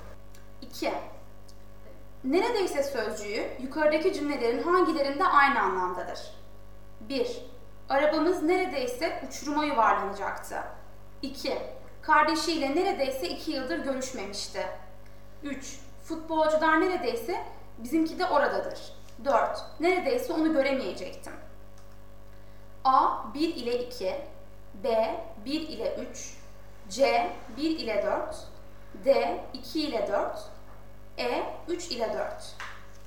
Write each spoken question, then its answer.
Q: Neredeyse sözcüğü yukarıdaki cümlelerin hangilerinde aynı anlamdadır?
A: Doğru yanıt C.